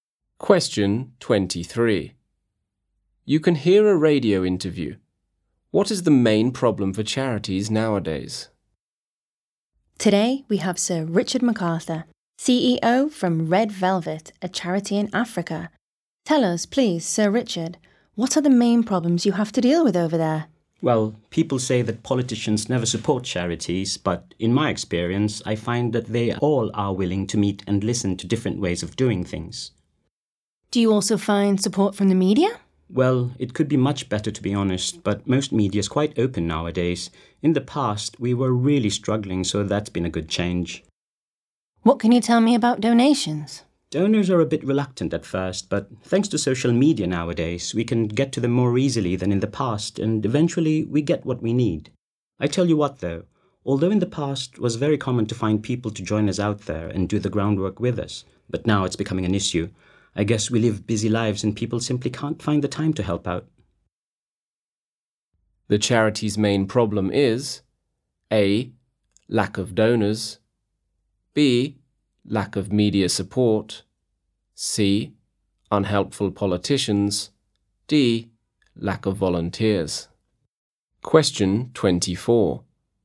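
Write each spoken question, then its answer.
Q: What is the main problem for charities nowadays?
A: D: Lack of volunteers.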